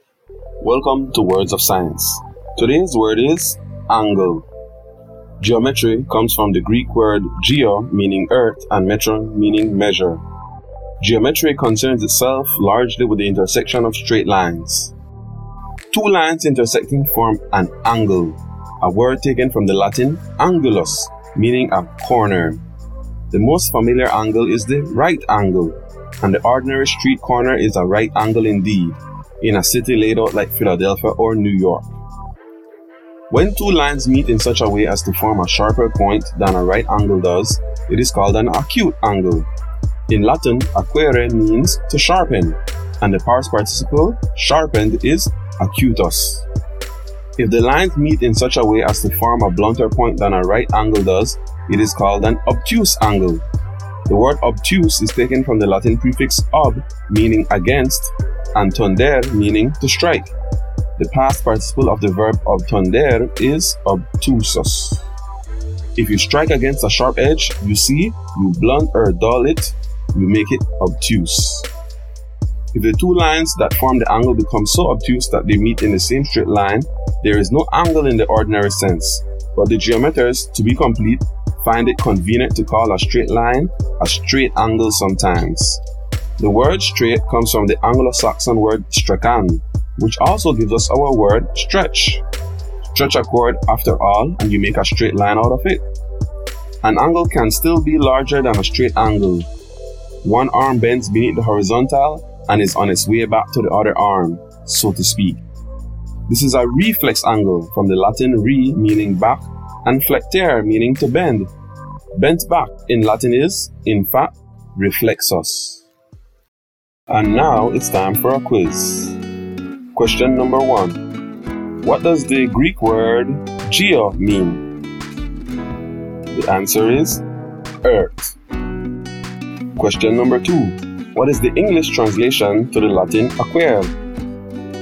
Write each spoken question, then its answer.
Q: What is the English translation to the Latin acuere?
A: It means to sharpen.